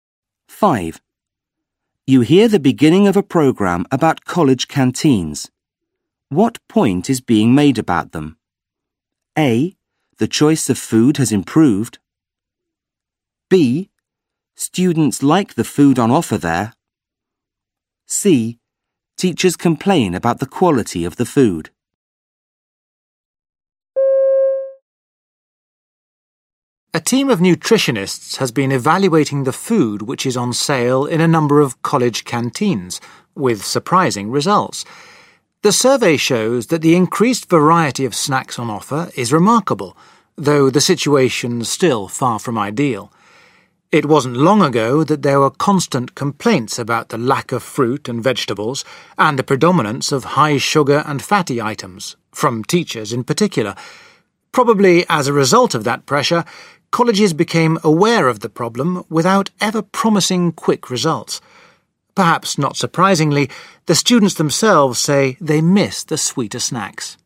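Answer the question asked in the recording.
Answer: A: The choice of food has improved.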